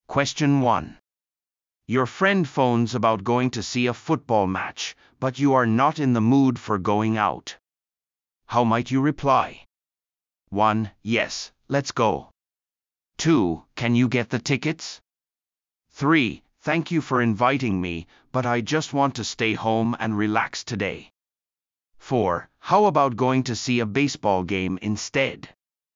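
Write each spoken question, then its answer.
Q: How might you reply?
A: 3: Thank you for inviting me, but I just want to stay home and relax today.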